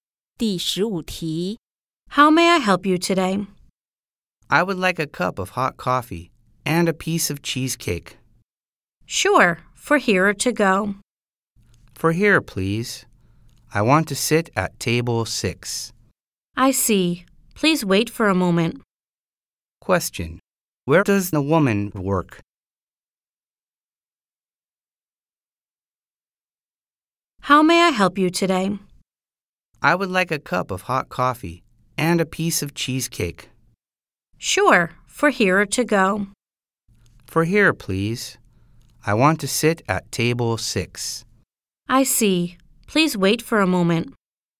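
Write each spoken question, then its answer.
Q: Where does the woman work?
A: At a café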